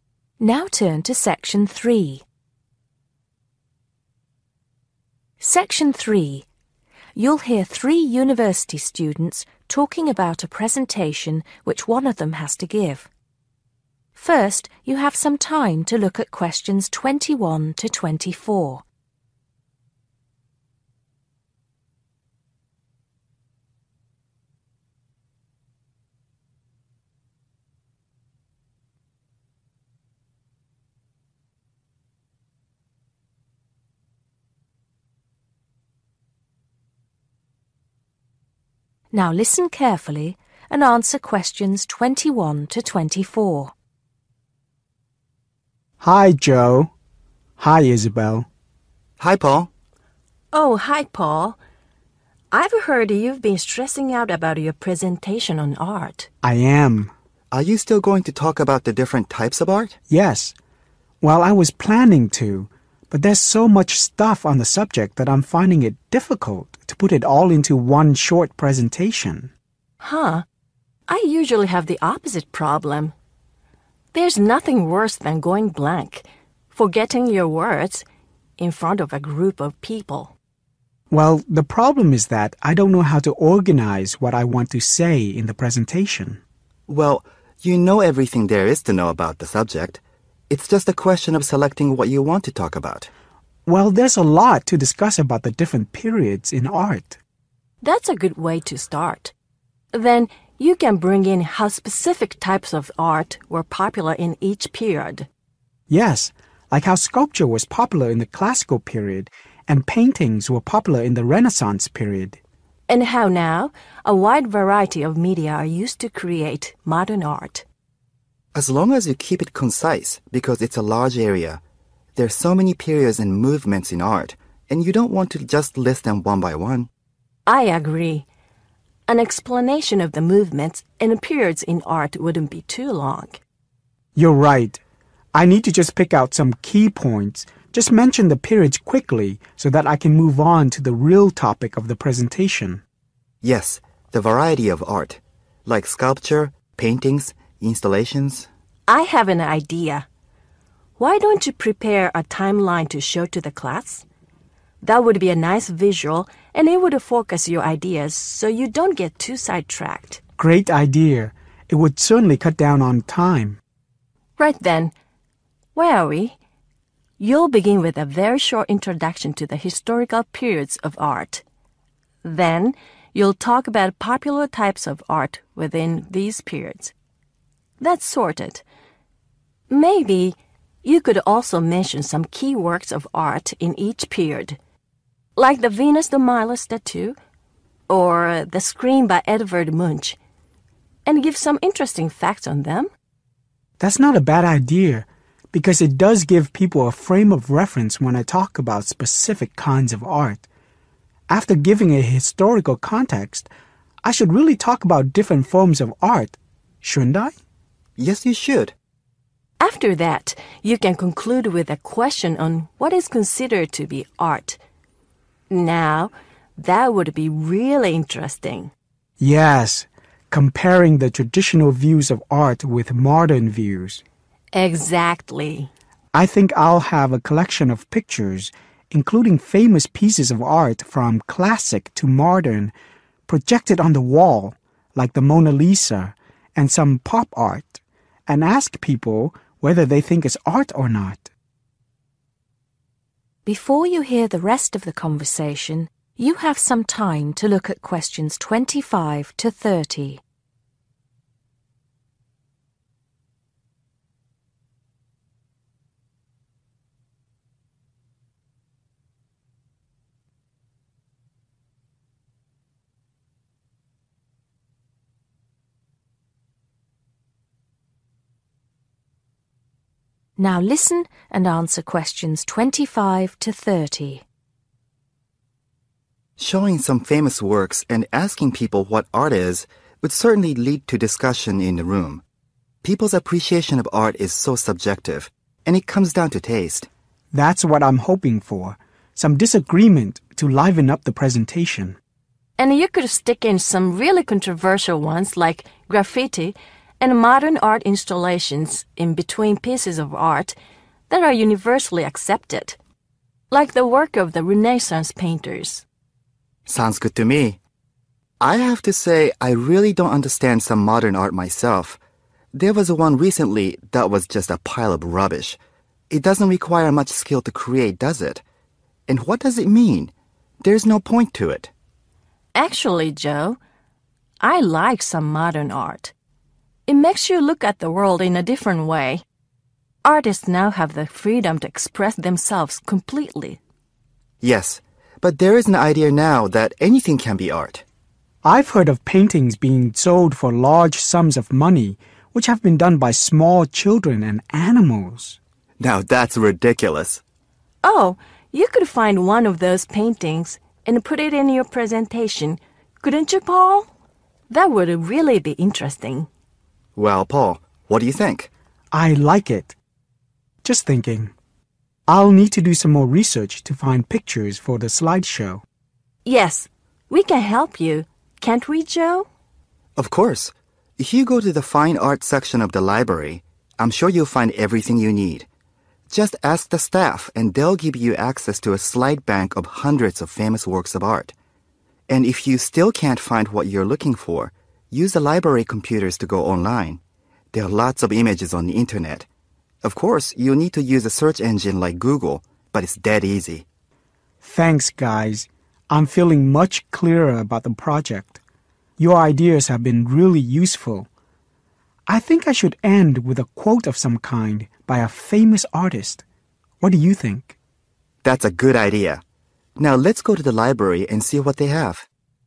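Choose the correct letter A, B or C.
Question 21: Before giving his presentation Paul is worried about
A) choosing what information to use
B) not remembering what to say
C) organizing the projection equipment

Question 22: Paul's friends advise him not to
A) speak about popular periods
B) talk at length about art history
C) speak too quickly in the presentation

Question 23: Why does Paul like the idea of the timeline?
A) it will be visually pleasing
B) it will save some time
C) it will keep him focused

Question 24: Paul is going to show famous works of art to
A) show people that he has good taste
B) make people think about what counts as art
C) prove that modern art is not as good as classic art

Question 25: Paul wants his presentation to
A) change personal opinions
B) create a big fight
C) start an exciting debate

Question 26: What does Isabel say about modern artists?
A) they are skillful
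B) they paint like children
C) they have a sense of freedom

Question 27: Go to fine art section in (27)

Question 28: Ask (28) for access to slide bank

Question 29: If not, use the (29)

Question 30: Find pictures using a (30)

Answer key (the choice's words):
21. choosing what information to use
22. talk at length about art history
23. it will save some time
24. make people think about what counts as art
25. start an exciting debate
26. they have a sense of freedom
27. the library
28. the staff
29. library computers
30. search engine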